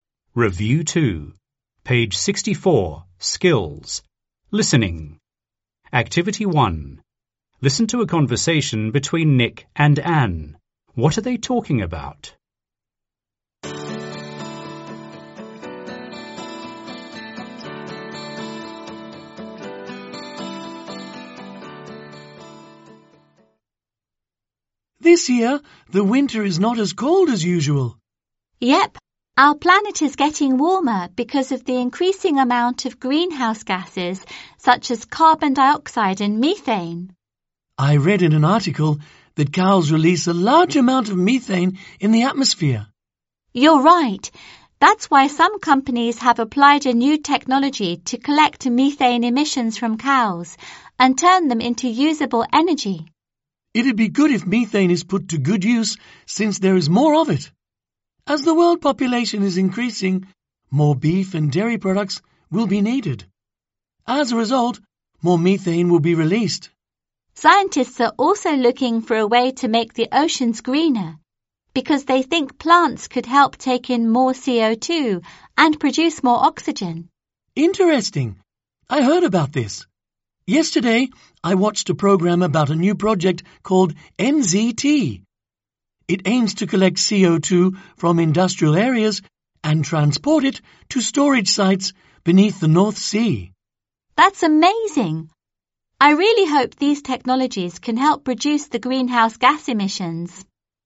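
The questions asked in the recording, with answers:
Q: What are they talking about?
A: New technologies to reduce greenhouse gas emissions and global warming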